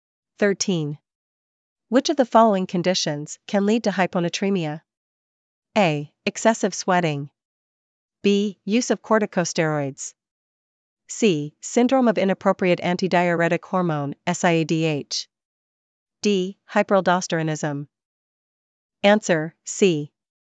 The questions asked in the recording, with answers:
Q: Which of the following conditions can lead to hyponatremia?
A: Answer, C. Syndrome of inappropriate antidiuretic hormone, SIADH.